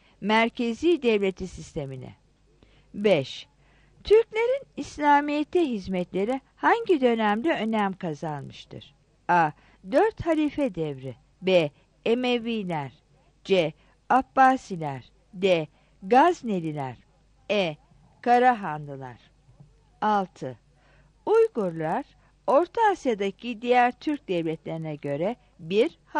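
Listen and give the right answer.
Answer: C: Abbasiler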